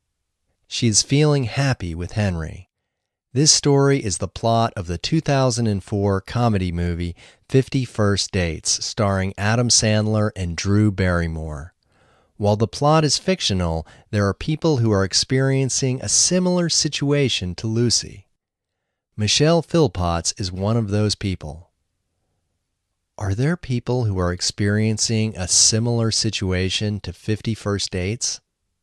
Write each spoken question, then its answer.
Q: Are there people who are experiencing a similar situation to 50 First Dates?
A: Yes, there are people experiencing a similar situation to 50 First Dates.